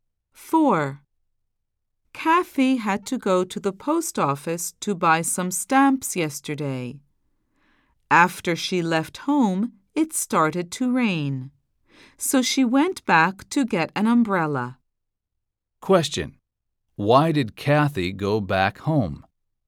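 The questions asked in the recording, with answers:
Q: Why did Kathy go back home?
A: To get an umbrella because it started to rain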